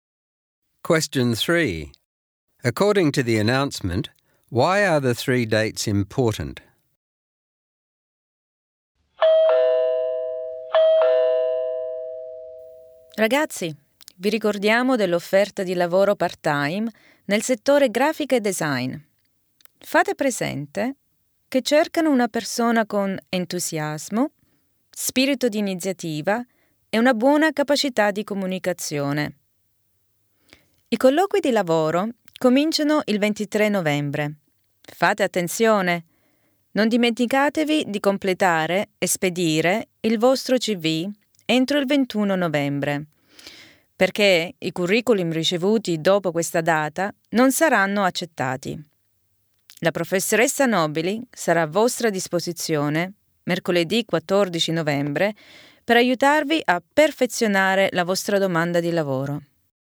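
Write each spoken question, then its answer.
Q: According to the announcement, why are the 3 dates important?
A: 14 November: Professoressa Nobili will help students improve their applications. 21 November: deadline for sending CVs. 23 November: job interviews begin.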